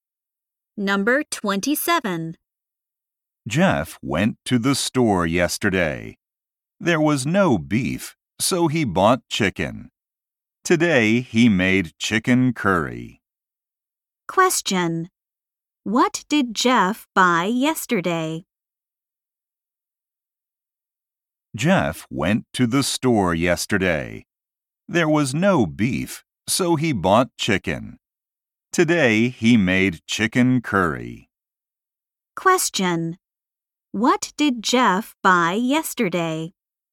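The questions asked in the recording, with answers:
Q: What did Jeff buy yesterday?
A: Chicken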